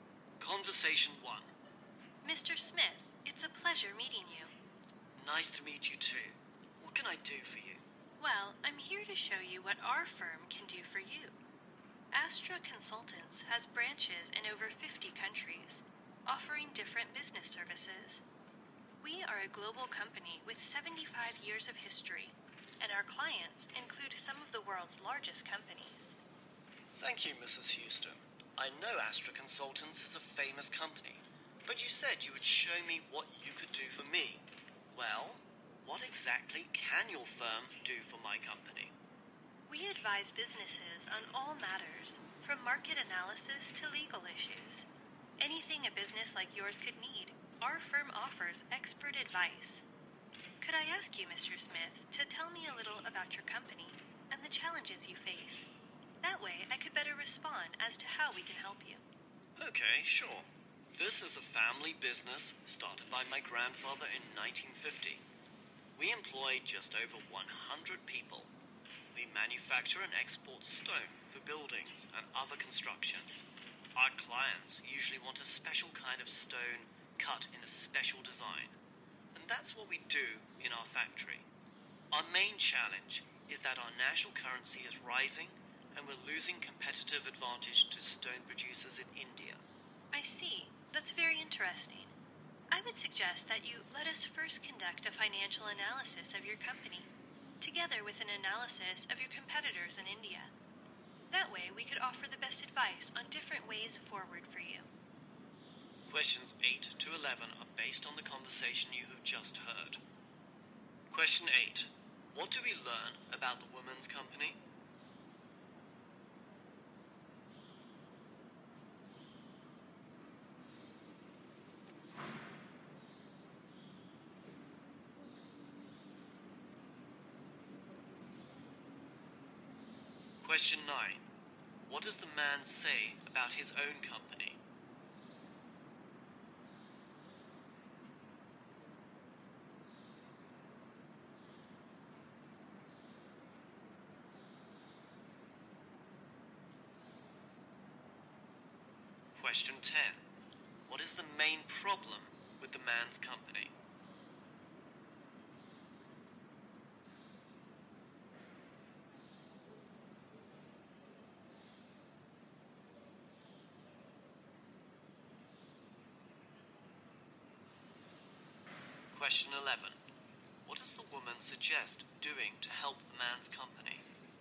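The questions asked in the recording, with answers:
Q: What do we learn about the woman's company?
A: It is a global company with 75 years of history and branches in over 50 countries.

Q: What does the man say about his own company?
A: It is a family business started by his grandfather in 1950.

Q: What is the main problem with the man's company?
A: Its national currency is rising, so it is losing its competitive edge to Indian producers.

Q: What does the woman suggest doing to help the man's company?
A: Carry out a financial analysis of the company and of its competitors in India.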